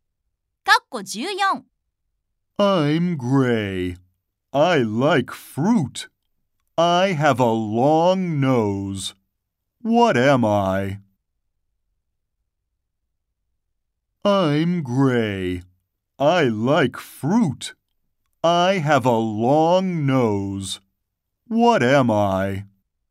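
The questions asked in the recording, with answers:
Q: I'm gray. I like fruit. I have a long nose. What am I?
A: An elephant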